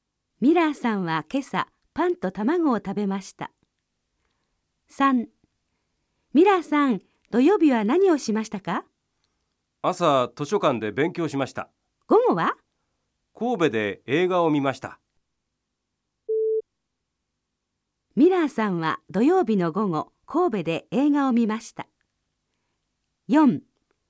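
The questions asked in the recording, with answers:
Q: ミラーさんは土曜日の午後、神戸で映画を見ました。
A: ○(正しい)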